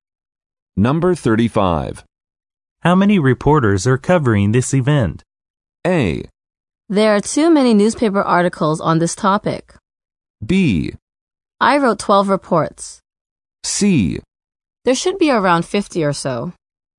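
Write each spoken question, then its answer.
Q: How many reporters are covering this event?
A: C: There should be around 50 or so.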